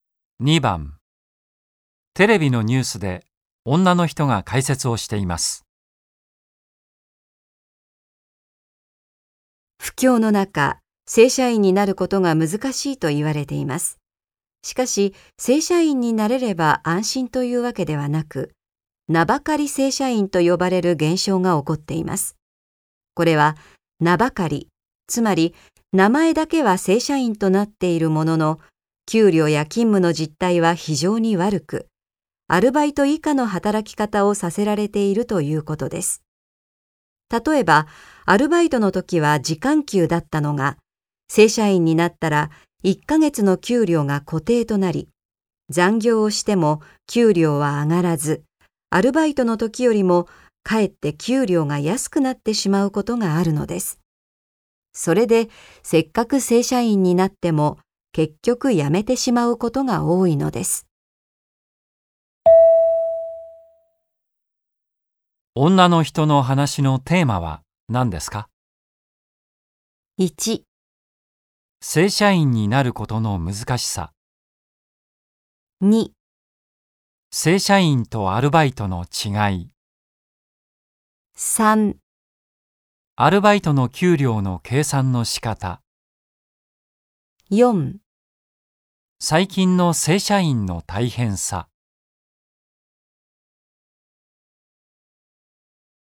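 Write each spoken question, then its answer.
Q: 女の人の話のテーマは何ですか?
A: 4: 最近の正社員の大変さ。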